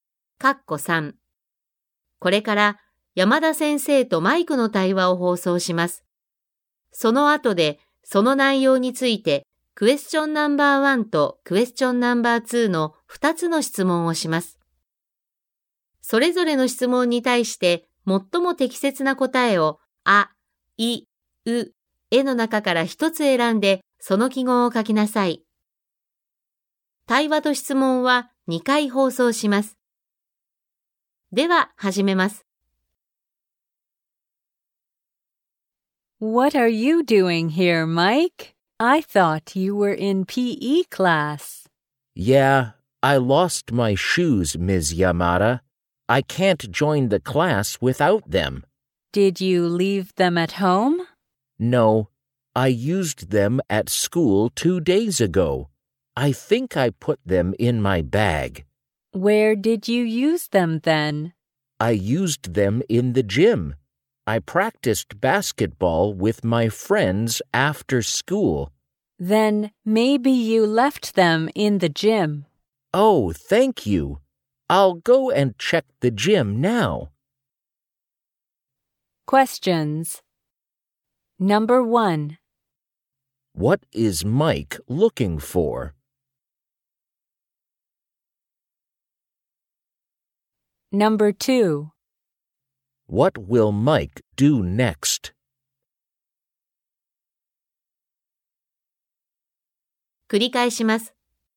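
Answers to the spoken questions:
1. His shoes
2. Go and check the gym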